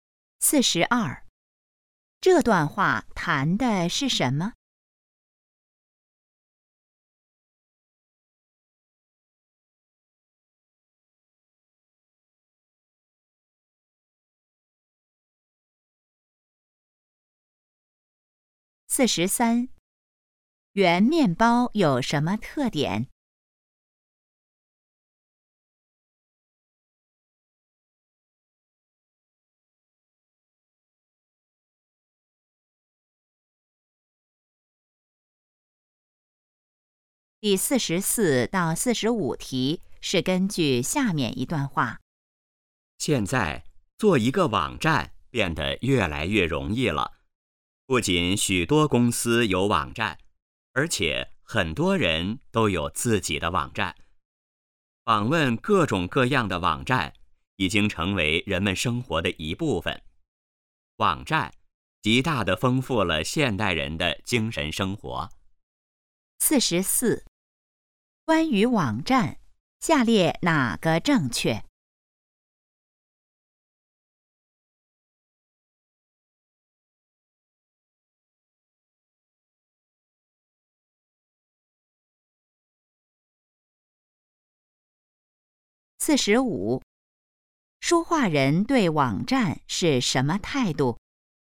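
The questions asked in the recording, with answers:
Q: 关于网站,下列哪个正确?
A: 做网站越来越容易了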